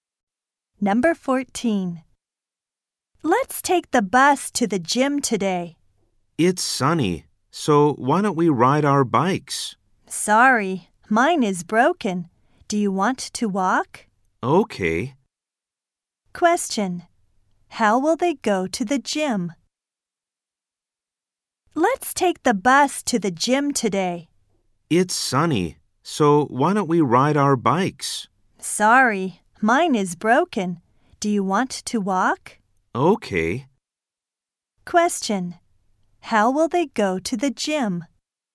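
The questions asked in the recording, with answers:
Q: How will they go to the gym?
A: They will walk.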